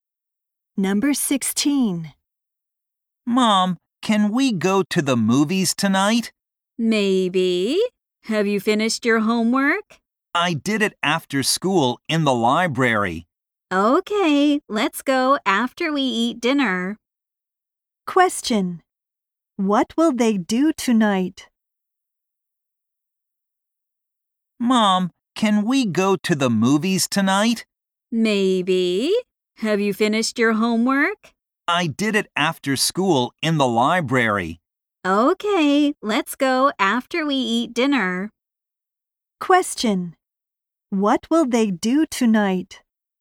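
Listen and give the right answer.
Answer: Go to the movies after dinner.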